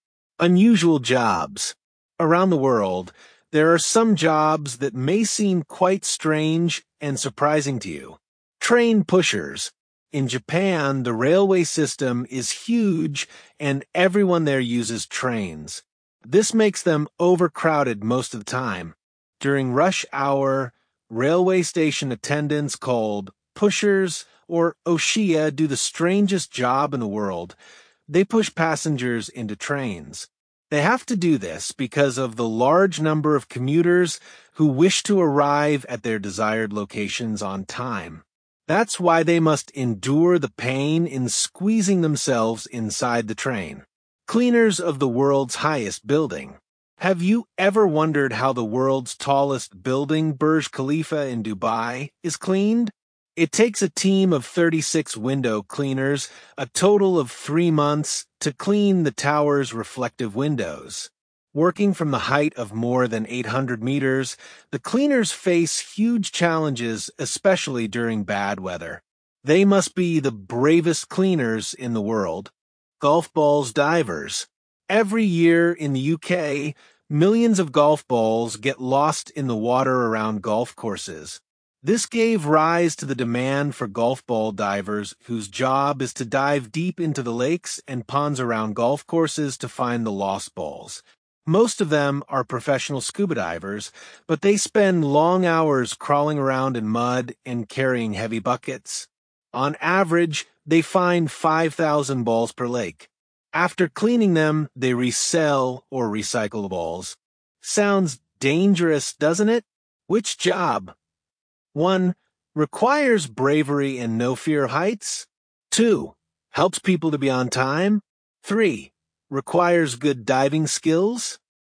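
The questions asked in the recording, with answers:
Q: Requires bravery and no fear of heights.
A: Cleaners of the world's highest building

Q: Helps people to be on time.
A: Train pushers

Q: Requires good diving skills.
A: Golf ball divers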